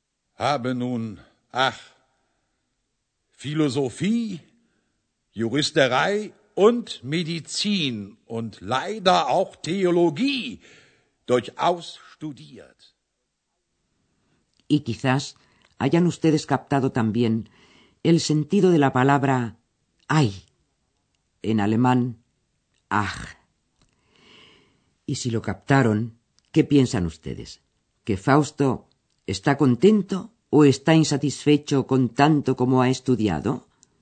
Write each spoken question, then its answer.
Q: ¿Que Fausto está contento o está insatisfecho con tanto como ha estudiado?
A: Sí, efectivamente, está insatisfecho.